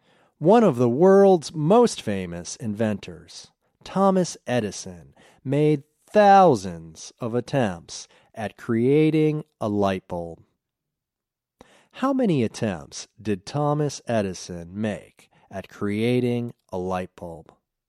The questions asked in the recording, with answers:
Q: How many attempts did Thomas Edison make at creating a light bulb?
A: Thomas Edison made thousands of attempts at creating a light bulb.